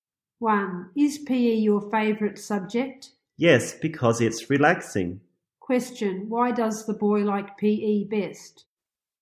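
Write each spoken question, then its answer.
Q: Question, why does the boy like PE best?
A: Because it's relaxing.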